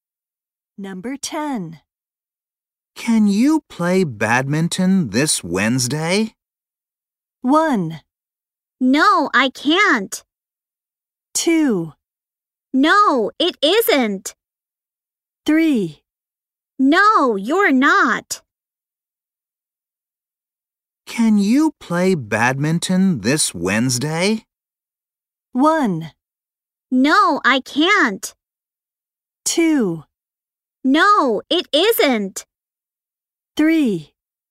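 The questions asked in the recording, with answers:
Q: Can you play badminton this Wednesday?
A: 1: No, I can't.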